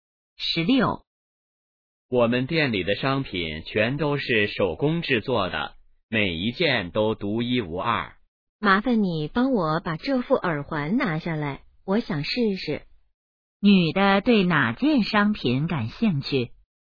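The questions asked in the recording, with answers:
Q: 女的对哪件商品感兴趣?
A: 耳环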